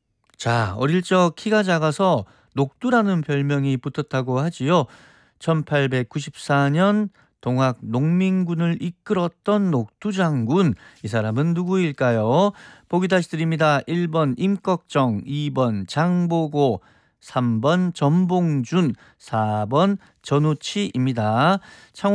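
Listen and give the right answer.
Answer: 3: 전봉준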